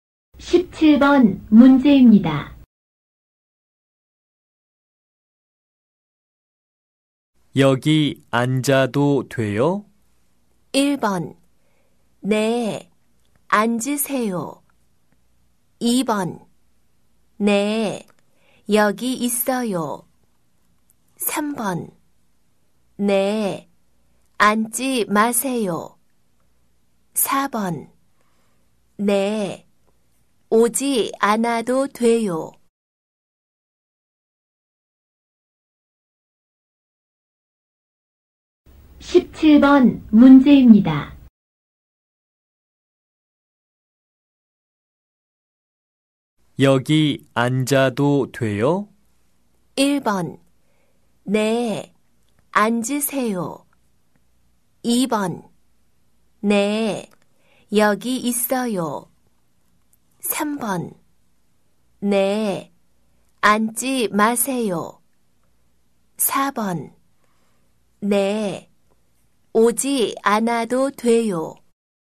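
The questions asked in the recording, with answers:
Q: 여기 앉아도 돼요?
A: 1: 네, 앉으세요.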